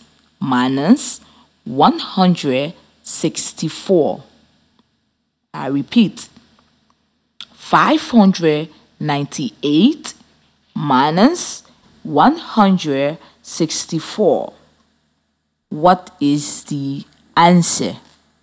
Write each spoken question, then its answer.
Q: What is the answer?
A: 434.